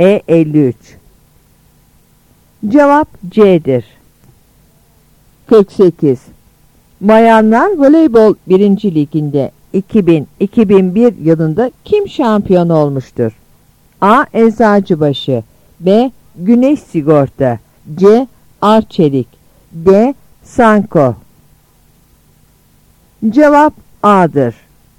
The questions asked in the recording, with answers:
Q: Liginde 2000-2001 yılında kim şampiyon olmuştur?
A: Cevap A'dır.